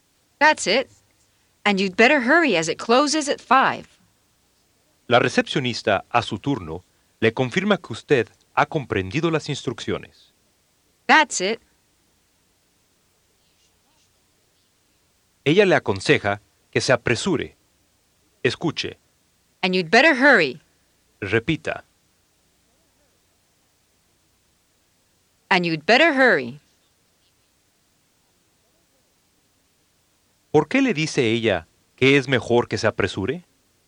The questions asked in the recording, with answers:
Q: ¿Por qué le dice ella que es mejor que se apresure?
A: As it closes at 5.